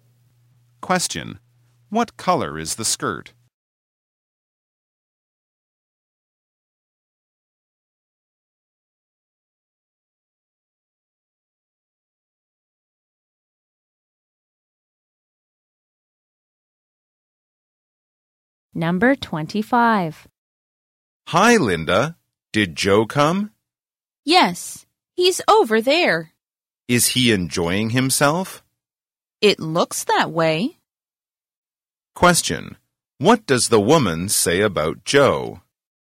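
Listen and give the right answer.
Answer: He seems to be enjoying himself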